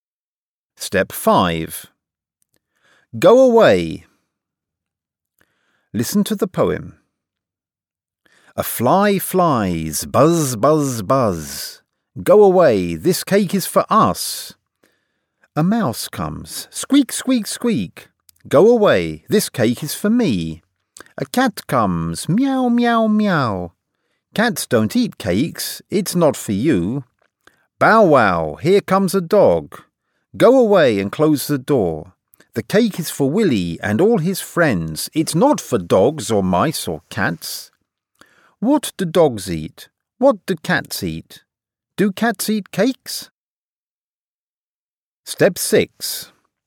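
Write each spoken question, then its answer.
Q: Do cats eat cakes?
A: No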